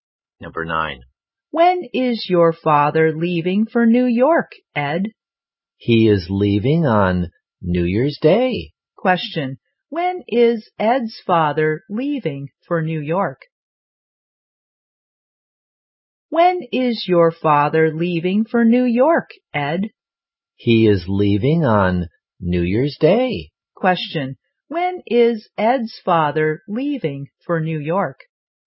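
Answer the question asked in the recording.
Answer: On New Year's Day.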